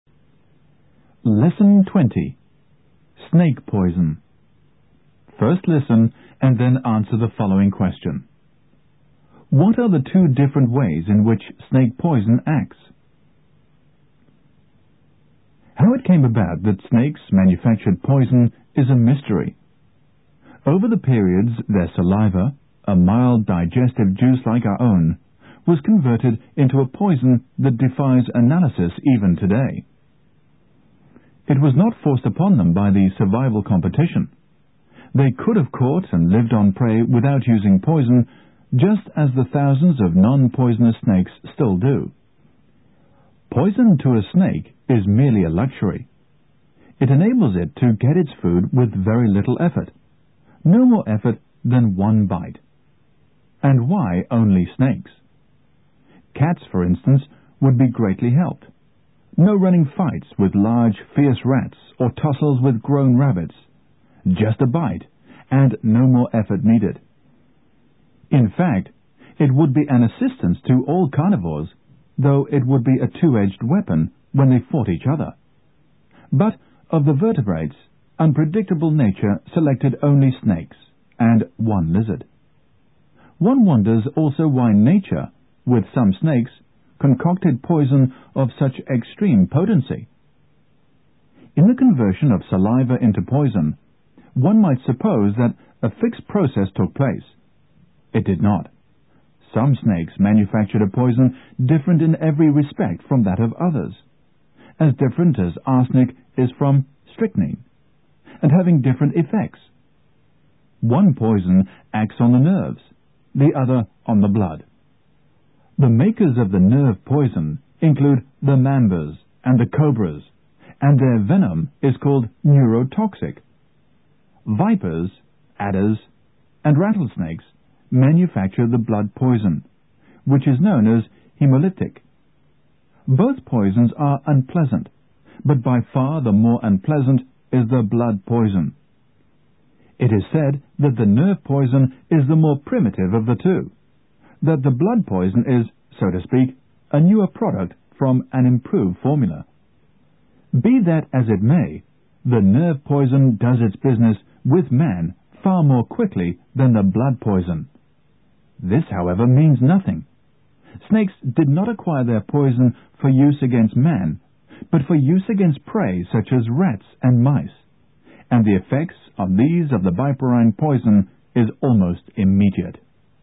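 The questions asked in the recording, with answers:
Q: What are the two different ways in which snake poison acts?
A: One poison acts on the nerves (neurotoxic), the other on the blood (hemolytic).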